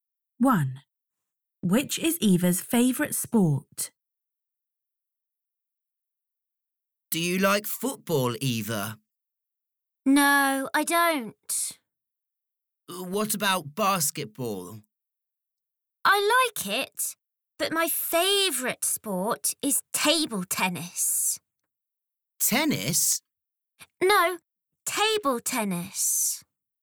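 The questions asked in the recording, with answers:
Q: Which is Eva's favourite sport?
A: table tennis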